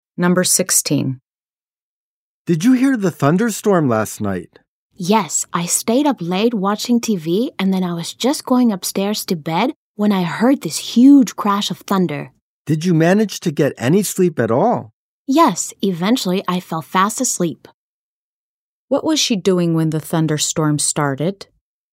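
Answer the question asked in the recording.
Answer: She was going upstairs to bed.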